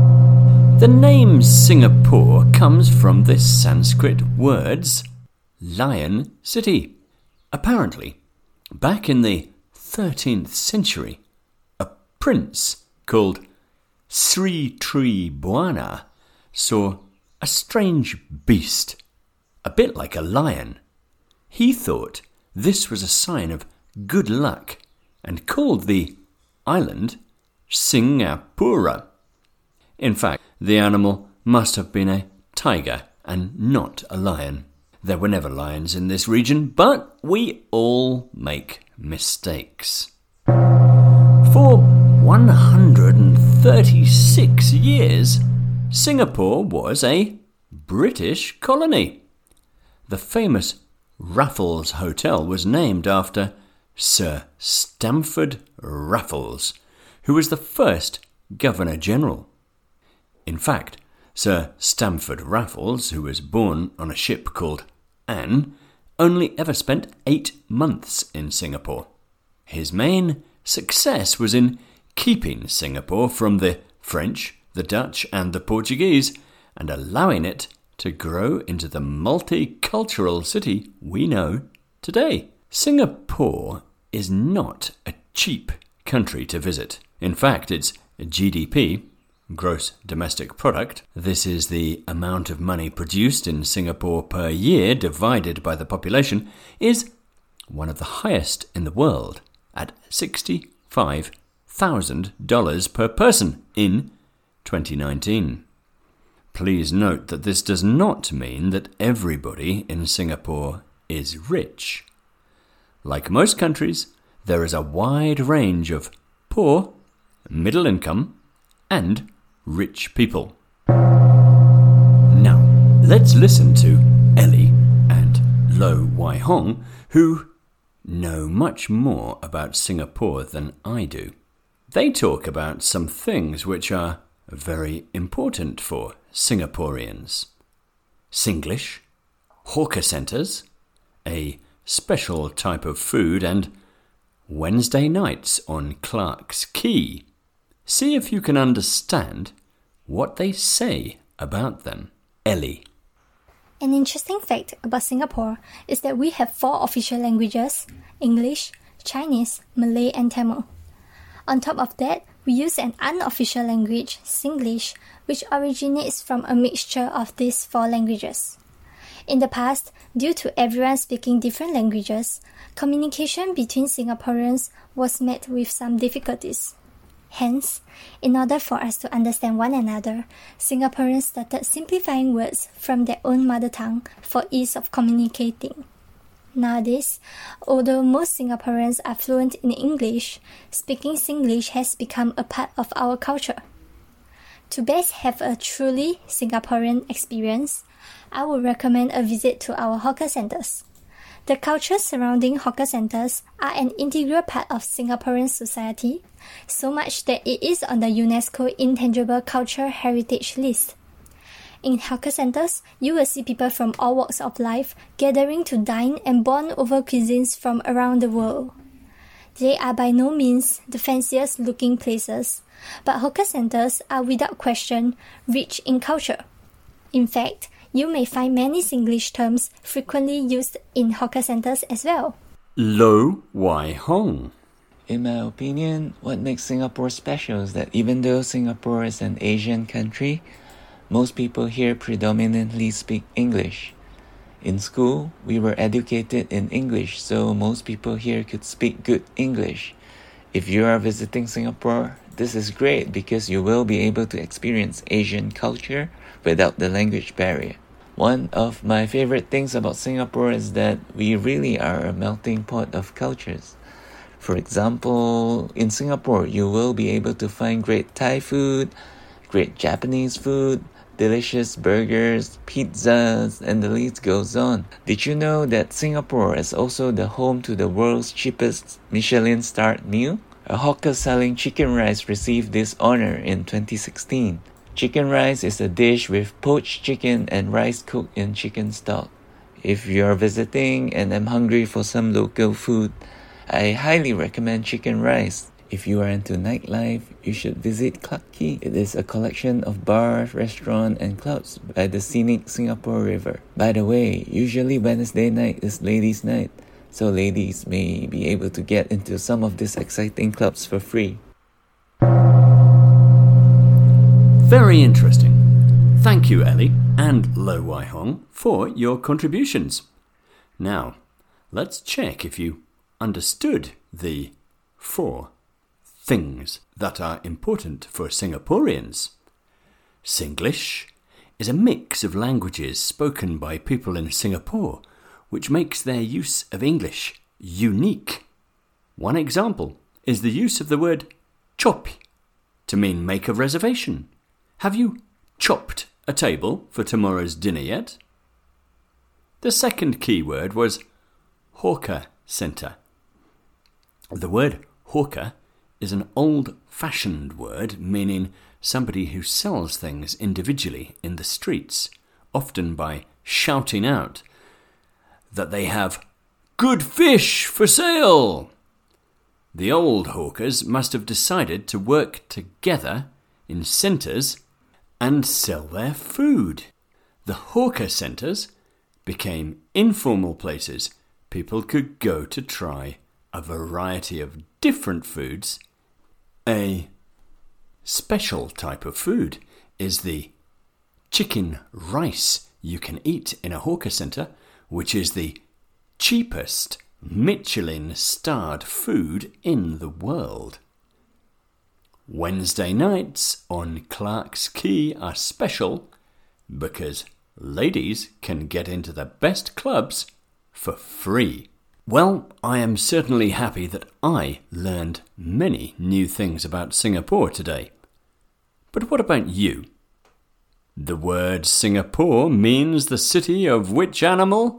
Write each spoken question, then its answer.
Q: The word Singapore means the city of which animal?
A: The lion.